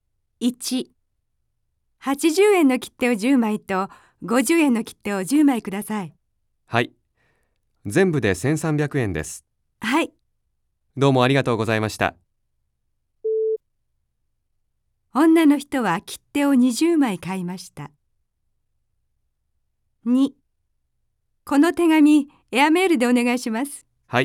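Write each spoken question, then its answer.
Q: 女の人は切手を20枚買いました。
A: はい(正しい)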